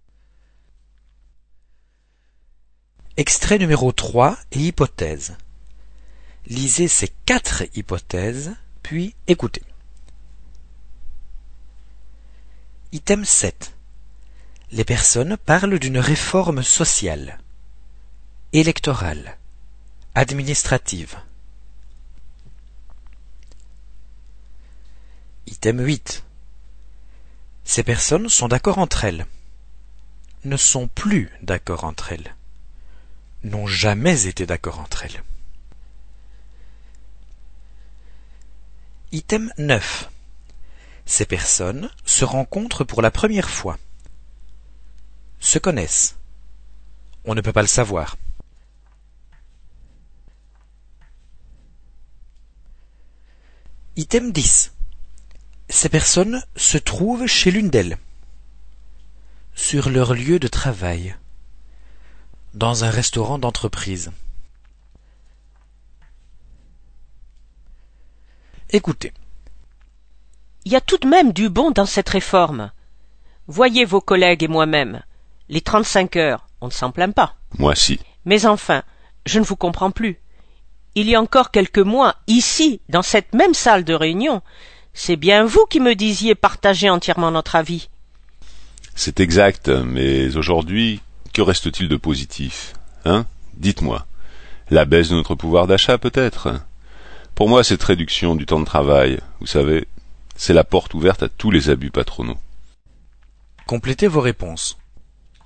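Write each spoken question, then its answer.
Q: Les personnes parlent d'une réforme sociale, électorale, administrative.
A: A: sociale

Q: Ces personnes sont d'accord entre elles, ne sont plus d'accord entre elles. N'ont jamais été d'accord entre elles.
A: B: ne sont plus d'accord entre elles

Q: Ces personnes se rencontrent pour la première fois, se connaissent. On ne peut pas le savoir.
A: B: se connaissent

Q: Ces personnes se trouvent chez l'une d'elles, sur leur lieu de travail. Dans un restaurant d'entreprise.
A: B: sur leur lieu de travail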